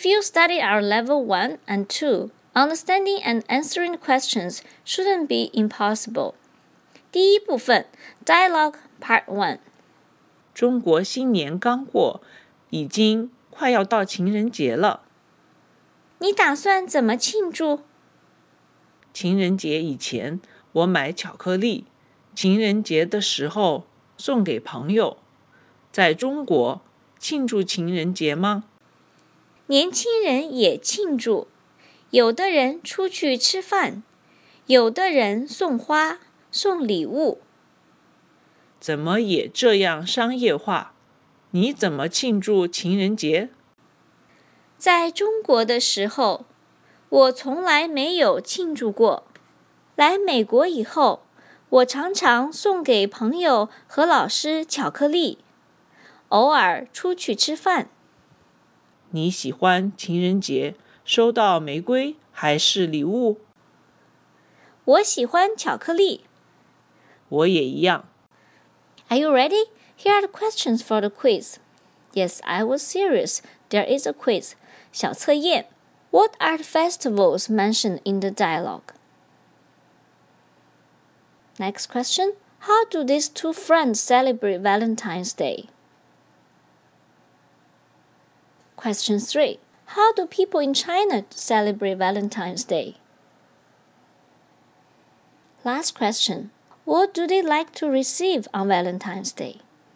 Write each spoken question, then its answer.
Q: What are the festivals mentioned in the dialogue?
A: 对话里说,中国新年刚过,已经快要到情人节了。

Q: How do these two friends celebrate Valentine's Day?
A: Before Valentine's Day, I buy chocolate and give them to my friends.

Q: How do people in China celebrate Valentine's Day?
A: Younger people also celebrate.

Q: What do they like to receive on Valentine's Day?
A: 答案是我喜欢巧克力